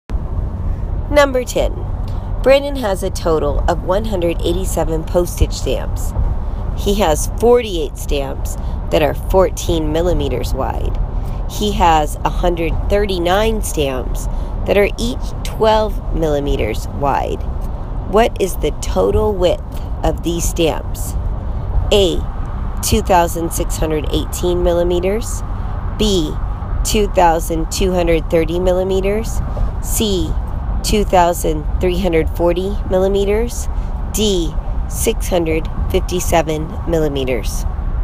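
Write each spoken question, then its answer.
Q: What is the total width of these stamps?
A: C: 2,340 millimeters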